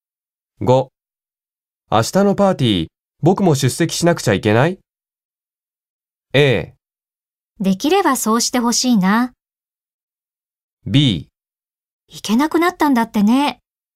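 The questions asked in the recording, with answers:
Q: 明日のパーティー僕も出席しなくちゃいけない?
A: A: できればそうしてほしいな。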